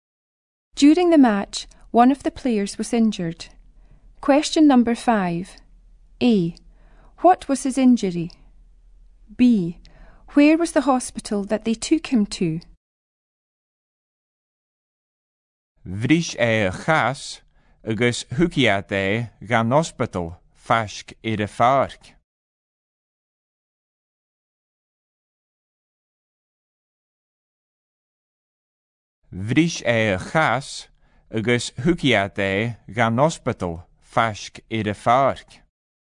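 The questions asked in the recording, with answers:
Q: A. What was his injury?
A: He broke his leg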